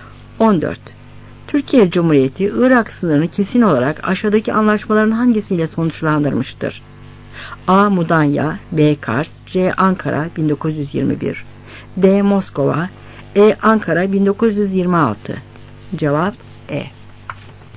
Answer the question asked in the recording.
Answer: Cevap E.